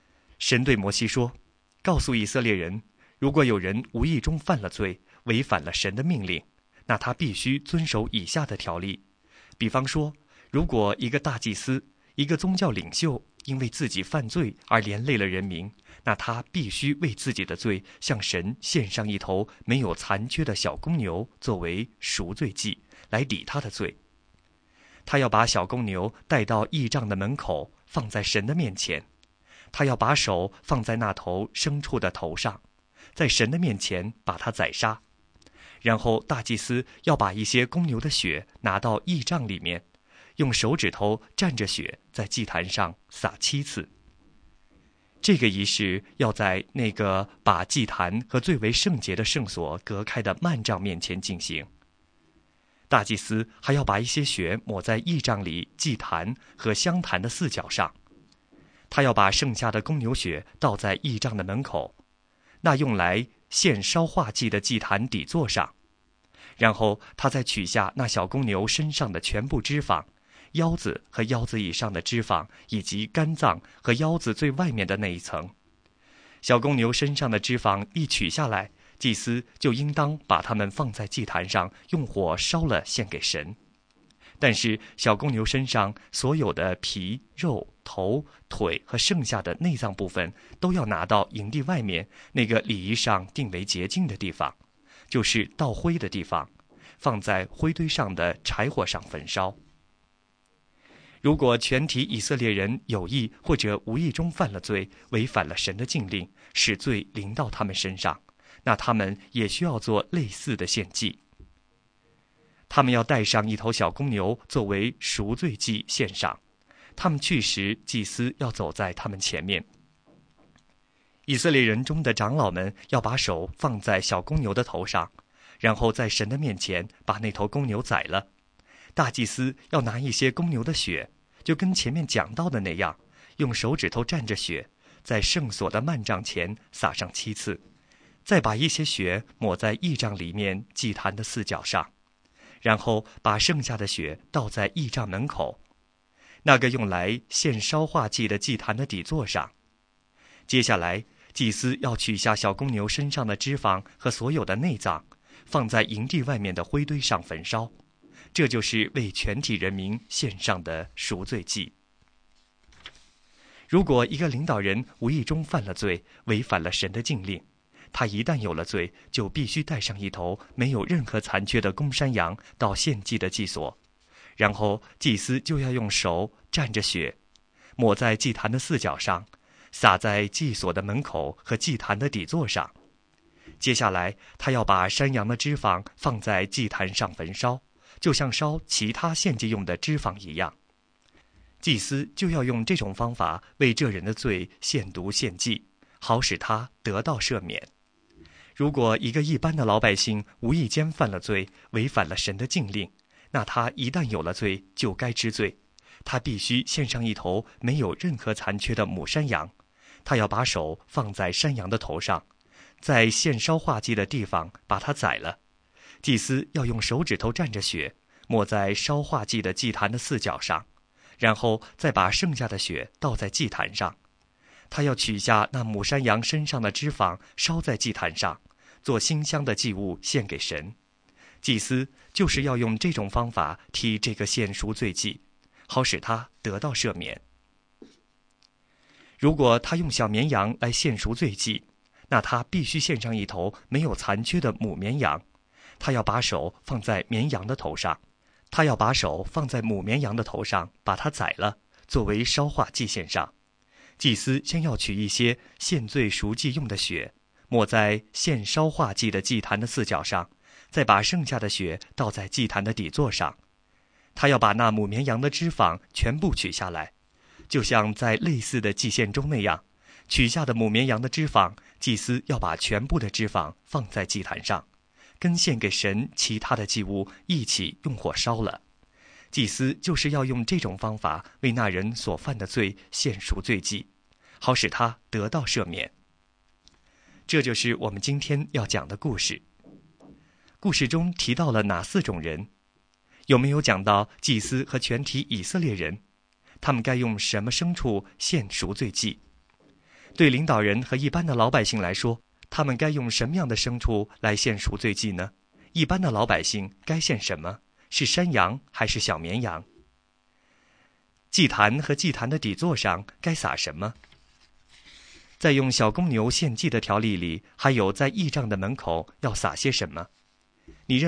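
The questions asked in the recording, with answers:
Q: 故事中提到了哪四种人?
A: 大祭司、全体以色列人、领导人、一般的老百姓

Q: 对领导人和一般的老百姓来说,他们该用什么样的牲畜来献赎罪祭呢?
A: 领导人献没有残缺的公山羊;一般的老百姓献没有残缺的母山羊或母绵羊

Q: 一般的老百姓该献什么?是山羊还是小绵羊?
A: 两种都可以:母山羊或母绵羊

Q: 在用小公牛献祭的条例里,还有在义帐的门口要撒些什么?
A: 小公牛的血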